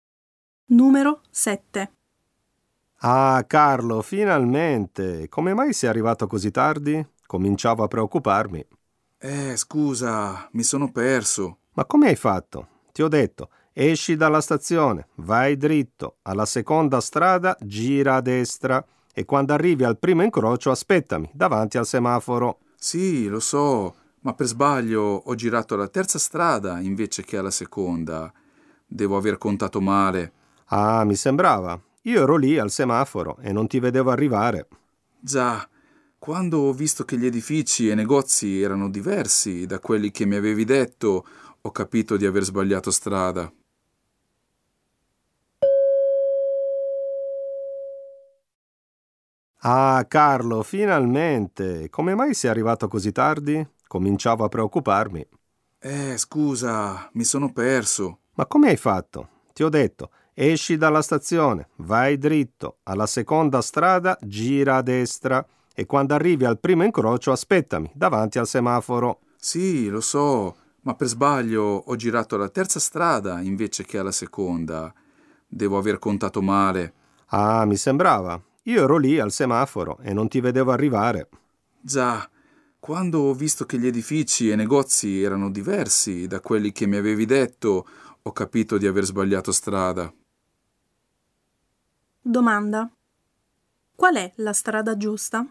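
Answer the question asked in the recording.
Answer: Uscire dalla stazione, andare dritto, girare a destra alla seconda strada e fermarsi al primo incrocio, davanti al semaforo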